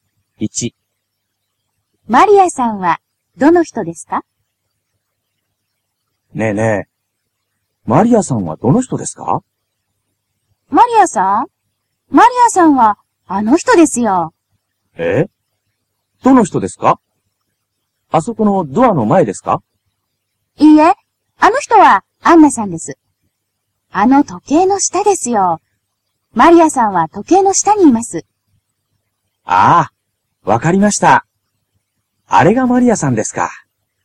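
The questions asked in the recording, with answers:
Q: マリアさんはどの人ですか?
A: 時計の下にいる人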